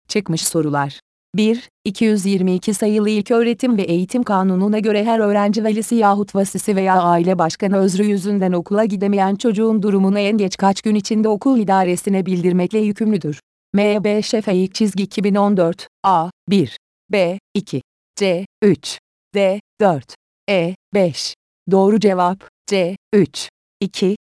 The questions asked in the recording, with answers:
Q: 222 sayılı İlköğretim ve Eğitim Kanunu'na göre her öğrenci velisi yahut vasisi veya aile başkanı özrü yüzünden okula gidemeyen çocuğun durumunu en geç kaç gün içinde okul idaresine bildirmekle yükümlüdür.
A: Doğru cevap C 3